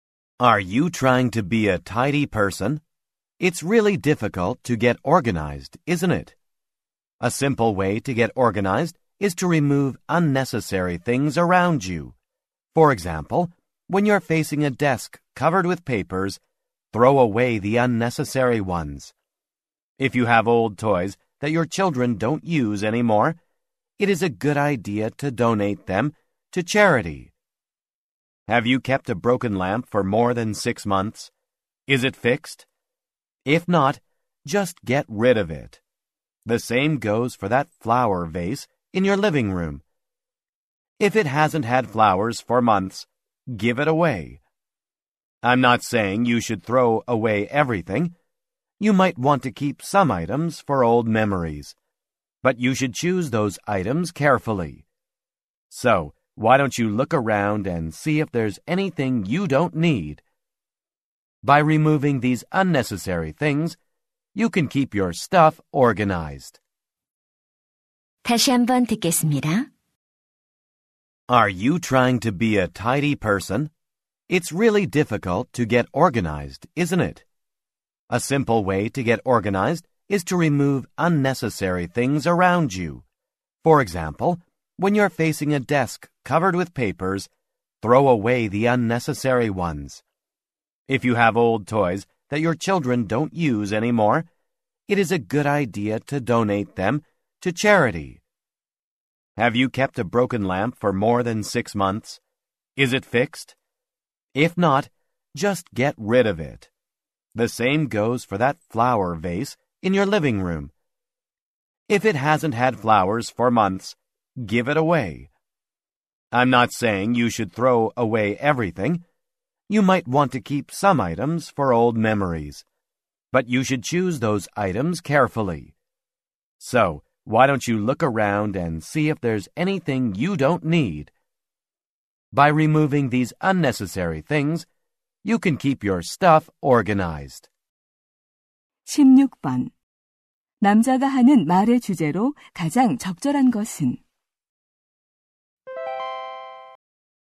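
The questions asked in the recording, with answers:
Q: 남자가 하는 말의 주제로 가장 적절한 것은?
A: 불필요한 물건을 없애 정리하는 방법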